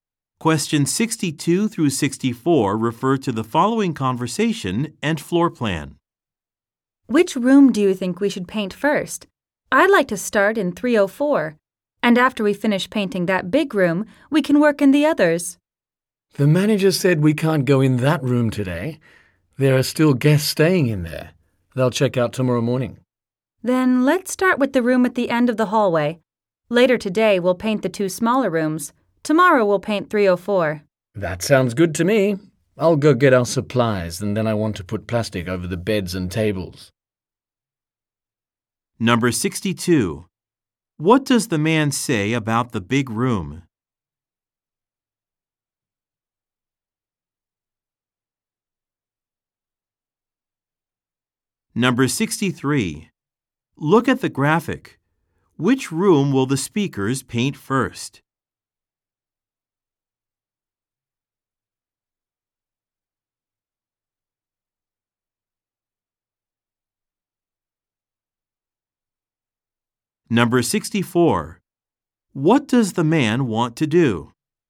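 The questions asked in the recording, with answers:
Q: What does the man say about the big room?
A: Guests are still staying in it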